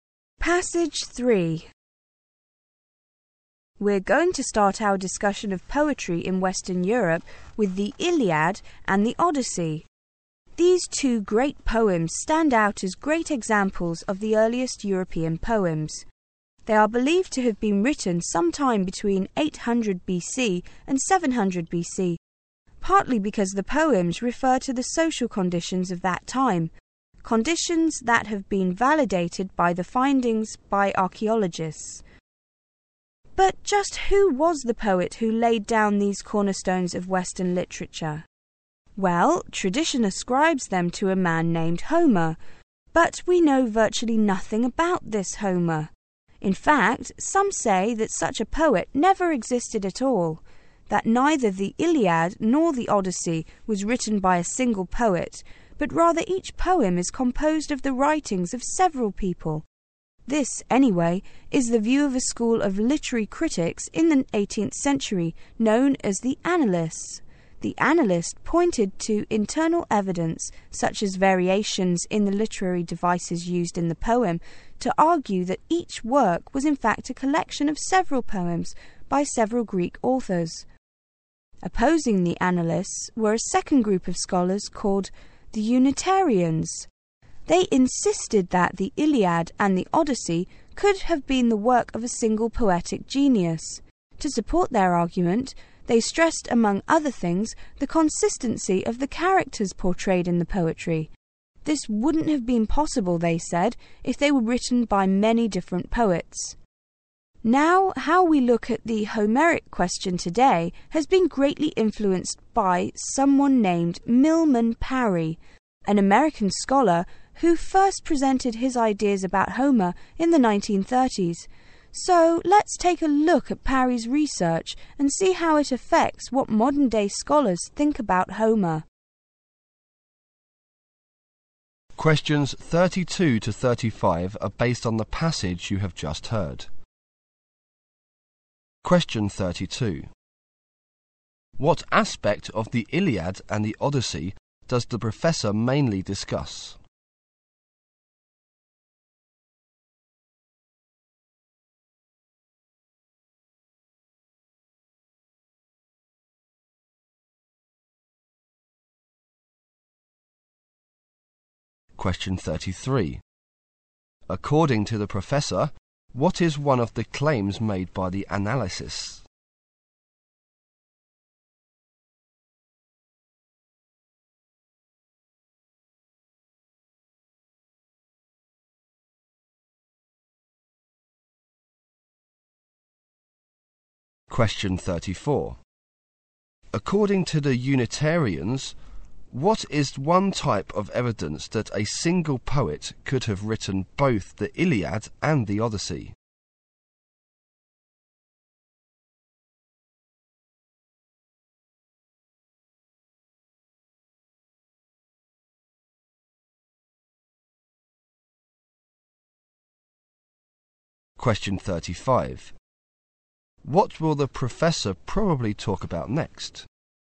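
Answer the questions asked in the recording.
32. Who wrote them (their authorship)
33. Each poem was a collection of works by several authors
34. The consistency of the characters
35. Milman Parry's research on Homer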